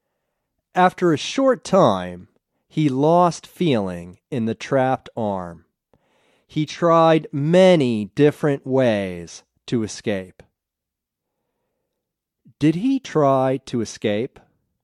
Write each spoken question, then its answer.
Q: Did he try to escape?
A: Yes, he tried many ways to escape.